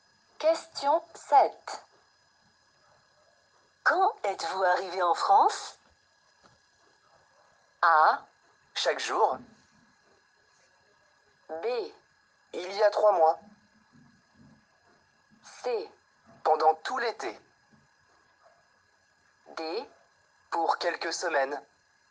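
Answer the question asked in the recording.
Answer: B: Il y a 3 mois.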